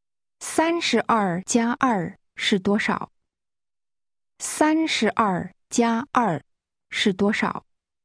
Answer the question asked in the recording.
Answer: 34。34。